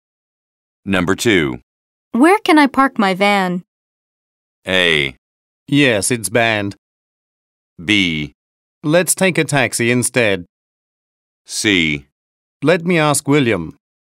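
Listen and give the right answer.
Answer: C: Let me ask William.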